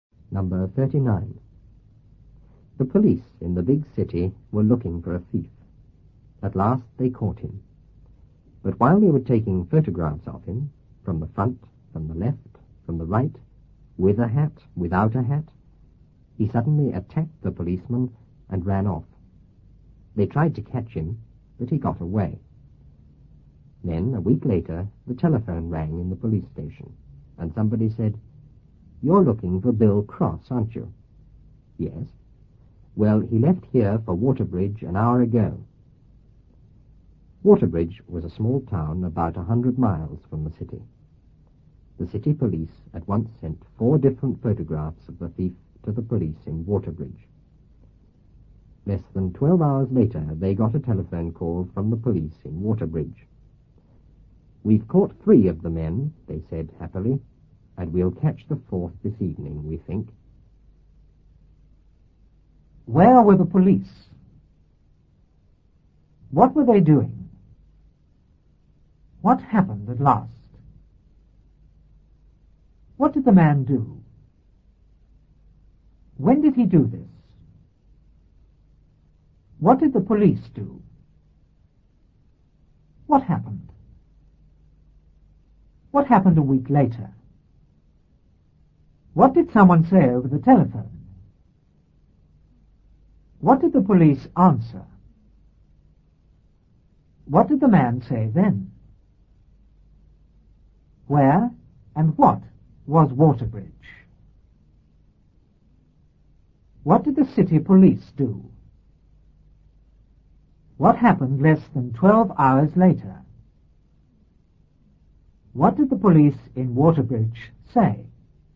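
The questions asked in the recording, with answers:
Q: Where were the police?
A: In the big city

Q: What were they doing?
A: Looking for a thief

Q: What happened at last?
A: They caught him

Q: What did the man do?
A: He attacked the policeman and ran off

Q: When did he do this?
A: While they were taking photographs of him

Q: What did the police do?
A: They tried to catch him

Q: What happened?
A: He got away

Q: What happened a week later?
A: The telephone rang in the police station

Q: What did someone say over the telephone?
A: You're looking for Bill Cross, aren't you?

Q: What did the police answer?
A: Yes

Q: What did the man say then?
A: He left here for Waterbridge an hour ago

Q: Where and what was Waterbridge?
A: A small town about 100 miles from the city

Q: What did the city police do?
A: Sent 4 different photographs of the thief to the police in Waterbridge

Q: What happened less than 12 hours later?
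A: They got a telephone call from the police in Waterbridge

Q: What did the police in Waterbridge say?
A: We've caught 3 of the men, and we'll catch the 4th this evening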